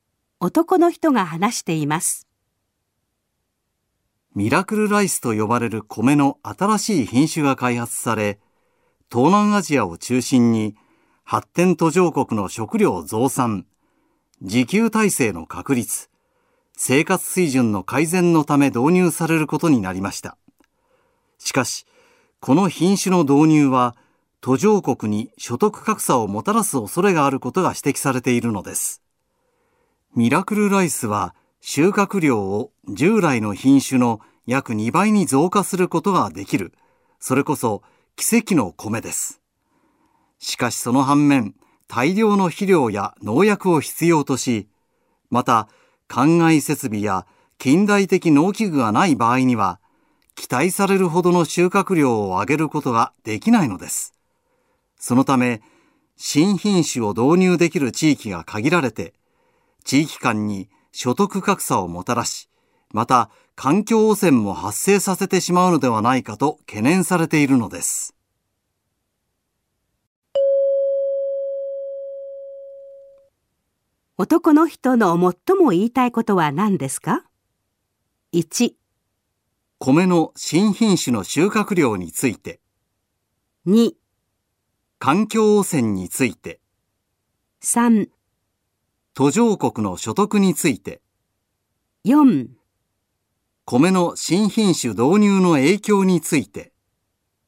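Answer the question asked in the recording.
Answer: 4: 米の新品種導入の影響について。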